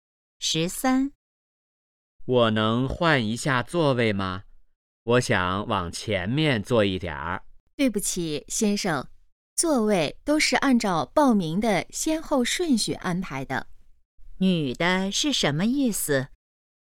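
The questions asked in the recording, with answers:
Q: 女的是什么意思?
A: 不能换座位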